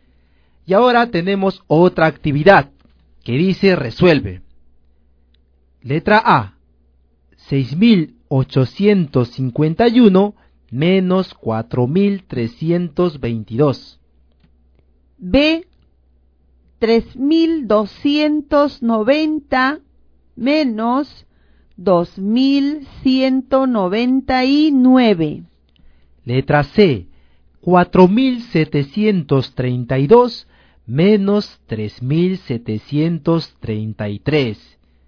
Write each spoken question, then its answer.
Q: 6.851 menos 4.322.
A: 2.529.

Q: 3.290 menos 2.199.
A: 1.091.

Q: 4.732 menos 3.733.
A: 999.